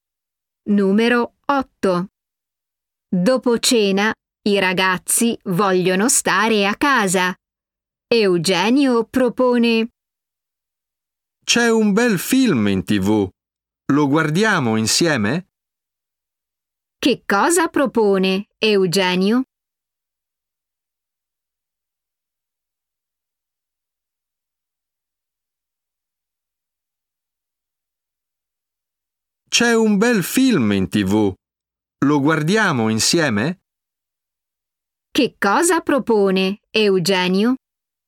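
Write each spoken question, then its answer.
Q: Che cosa propone Eugenio?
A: guardare insieme un film in TV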